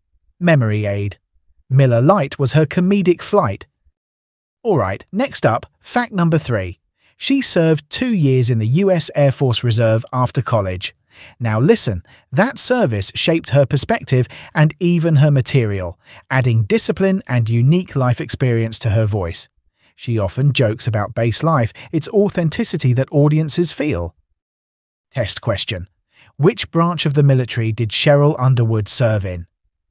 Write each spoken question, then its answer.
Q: Which branch of the military did Sheryl Underwood serve in?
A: Correct answer. US Air Force Reserve.